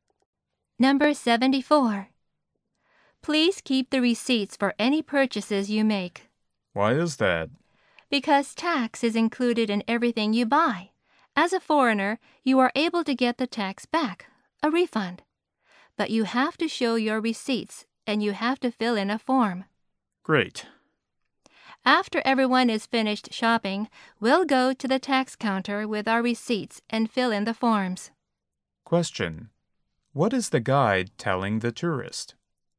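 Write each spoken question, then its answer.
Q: What is the guide telling the tourist?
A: Keep receipts to get a tax refund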